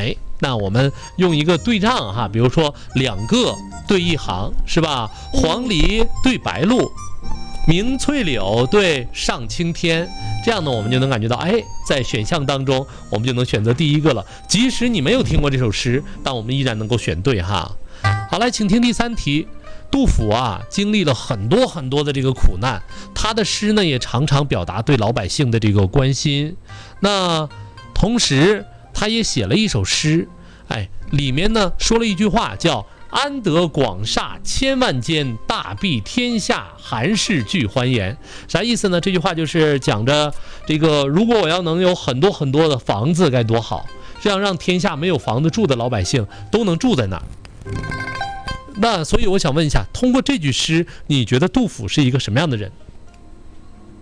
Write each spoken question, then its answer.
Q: 那所以我想问一下,通过这句诗你觉得杜甫是一个什么样的人?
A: 很善良,心怀百姓的人,是吧?